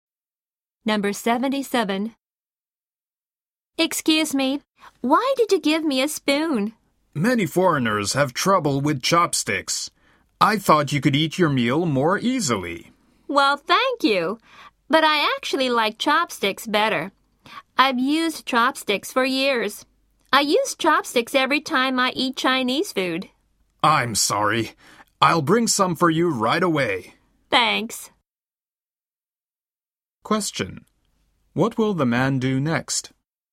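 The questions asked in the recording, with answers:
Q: What will the man do next?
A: Bring chopsticks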